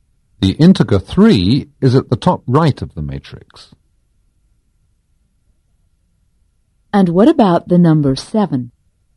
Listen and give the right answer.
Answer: The number 7 is at the bottom left of the matrix.